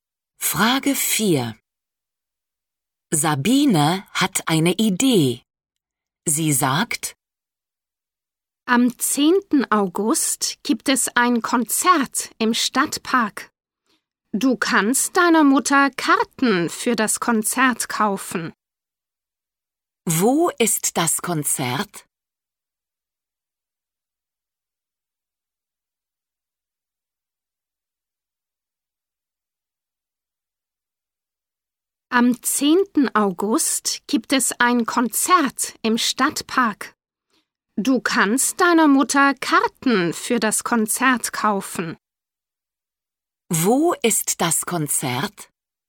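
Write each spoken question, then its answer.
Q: Wo ist das Konzert?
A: im Stadtpark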